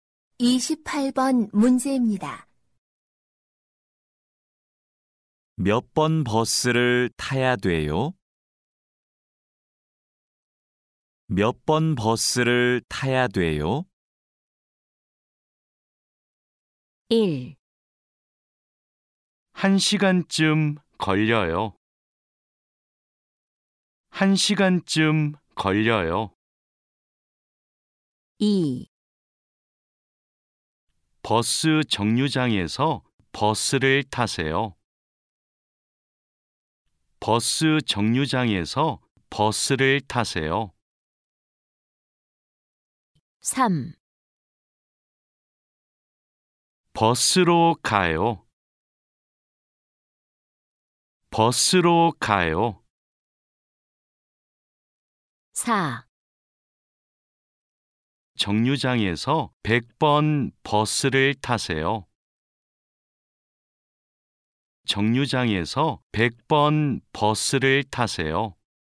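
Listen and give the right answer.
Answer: 4: 정류장에서 100번 버스를 타세요.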